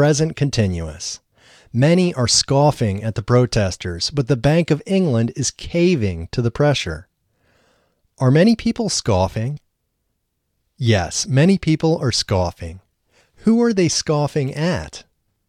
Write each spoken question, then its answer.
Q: Who are they scoffing at?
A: They are scoffing at the protesters.